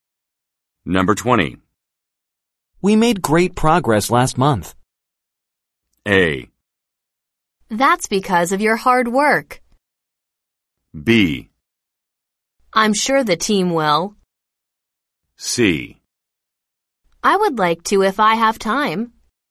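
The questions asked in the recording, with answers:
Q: We made great progress last month.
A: A: That's because of your hard work.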